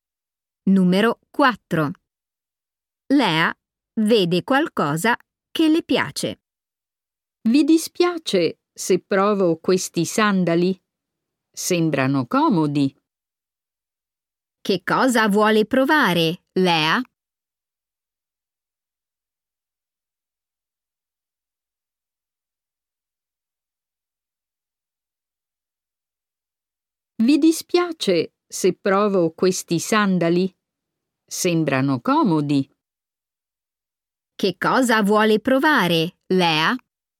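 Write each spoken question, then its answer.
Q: Che cosa vuole provare, Lea?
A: dei sandali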